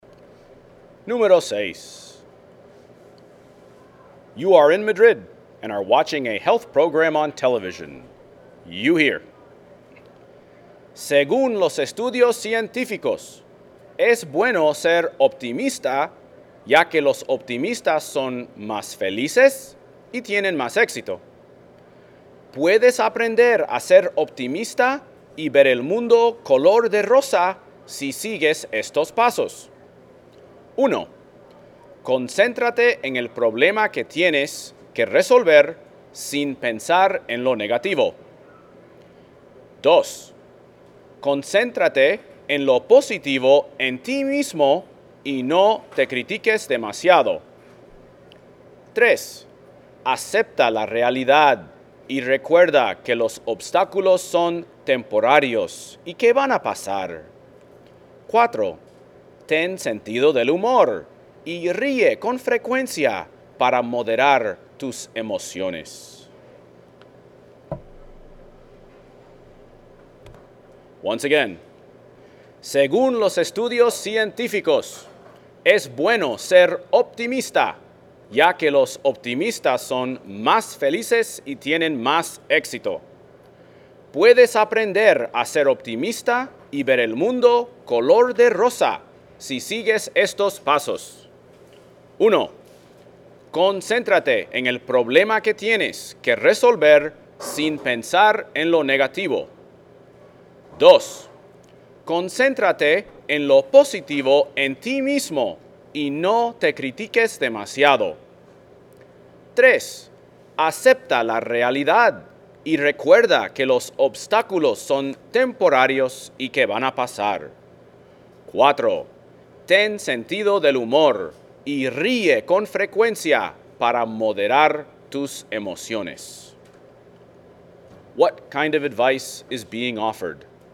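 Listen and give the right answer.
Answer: Advice on how to become optimistic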